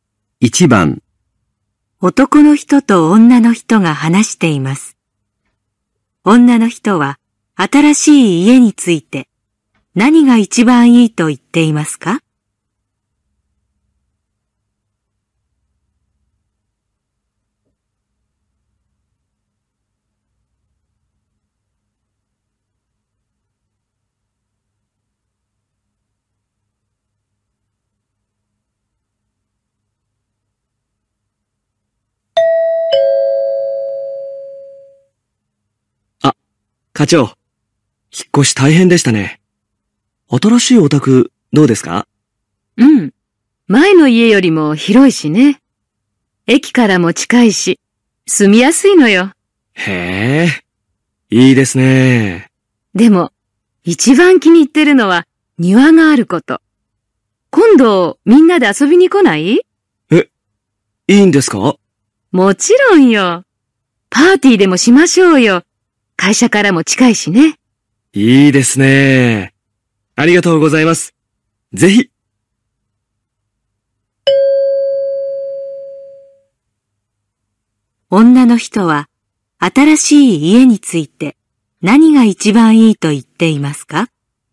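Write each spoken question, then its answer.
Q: 女の人は新しい家について何が一番いいと言っていますか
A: 庭があること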